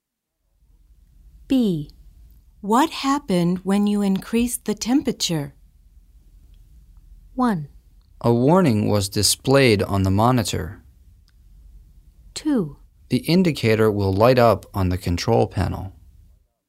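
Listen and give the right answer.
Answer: 1: A warning was displayed on the monitor.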